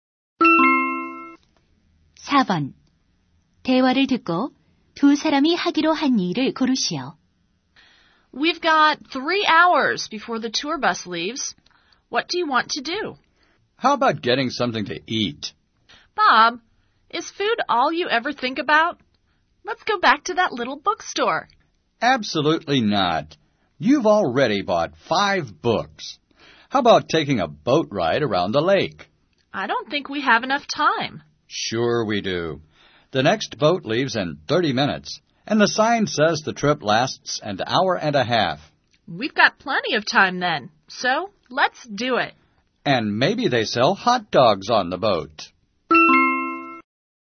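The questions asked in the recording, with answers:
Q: 대화를 듣고 두 사람이 하기로 한 일을 고르시오.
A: 호수에서 보트 타기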